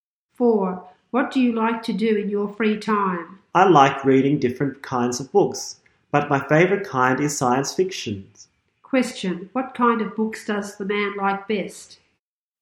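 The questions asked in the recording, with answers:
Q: Question, what kind of books does the man like best?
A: Science fiction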